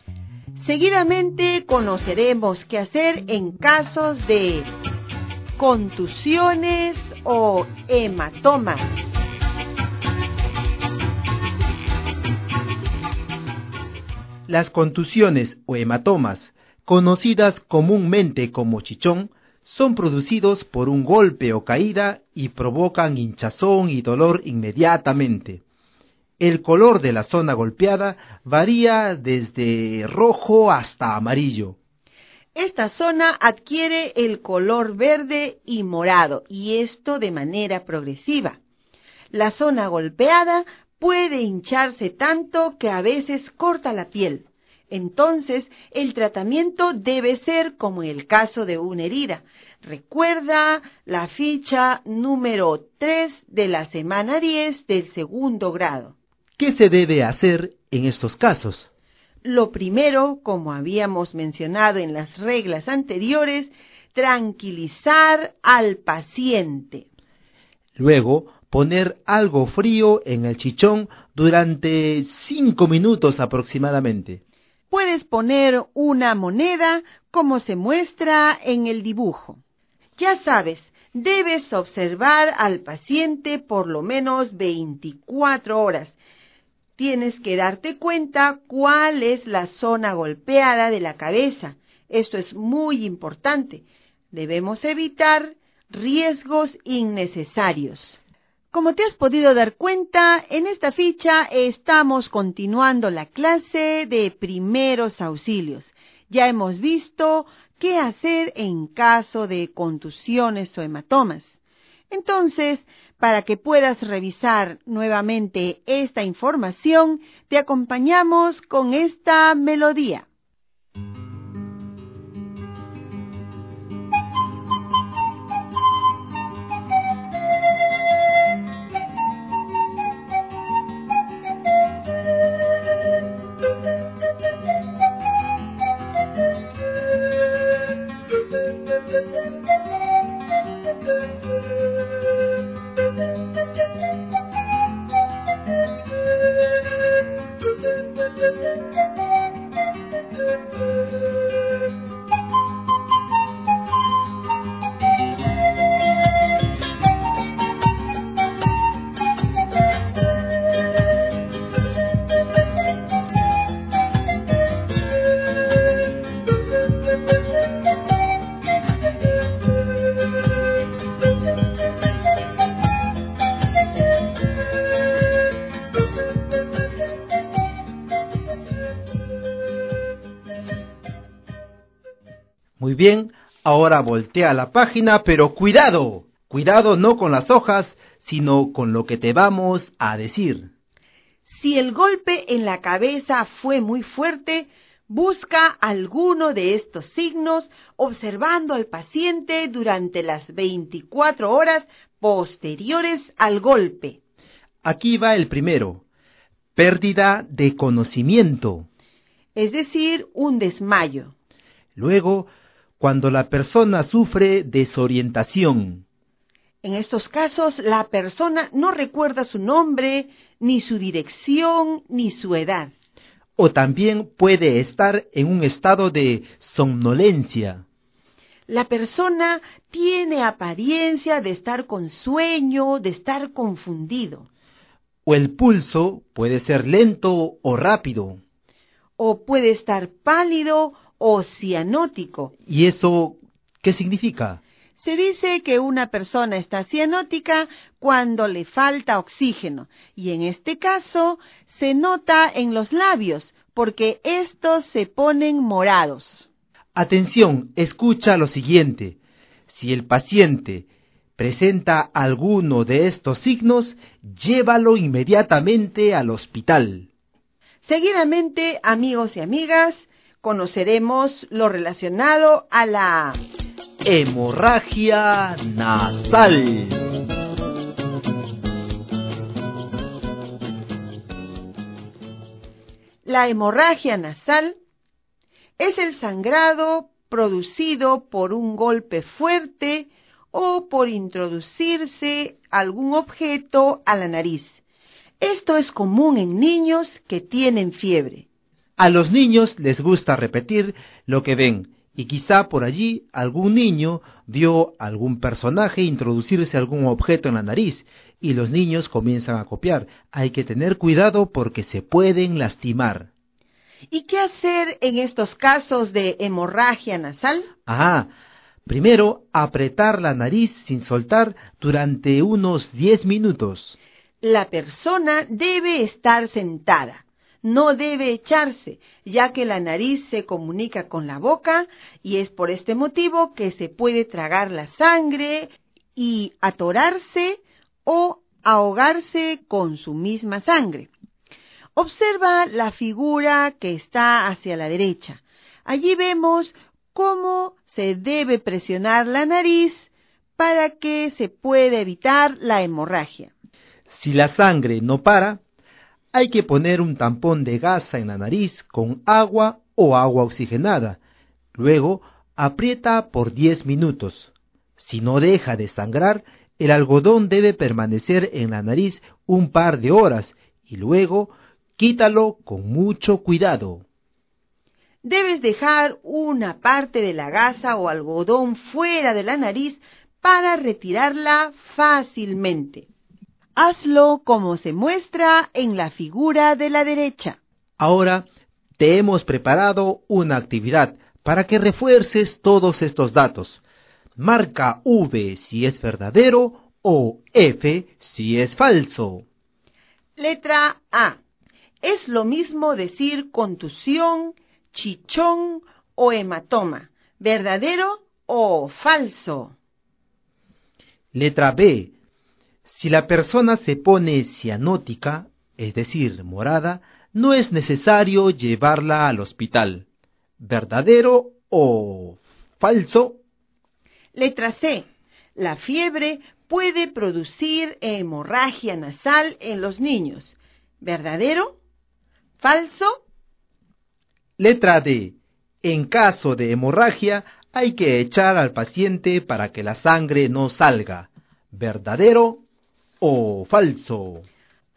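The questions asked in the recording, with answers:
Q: Letra A. Es lo mismo decir contusión, chichón o hematoma. ¿Verdadero o falso?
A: Verdadero

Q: Letra B. Si la persona se pone cianótica, es decir, morada, no es necesario llevarla al hospital. ¿Verdadero o falso?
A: Falso

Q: Letra C. La fiebre puede producir hemorragia nasal en los niños. ¿Verdadero? ¿Falso?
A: Verdadero

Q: Letra D. En caso de hemorragia, hay que echar al paciente para que la sangre no salga. ¿Verdadero o falso?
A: Falso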